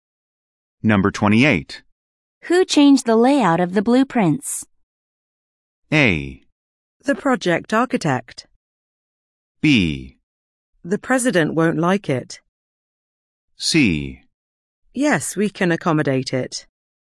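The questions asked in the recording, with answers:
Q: Who changed the layout of the blueprints?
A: A: The project architect.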